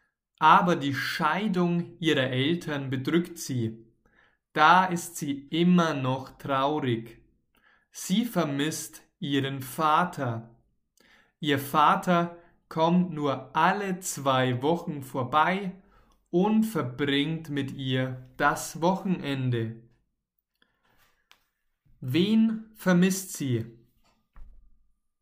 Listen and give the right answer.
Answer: Ihren Vater. Sie, also Lula, vermisst ihren Vater.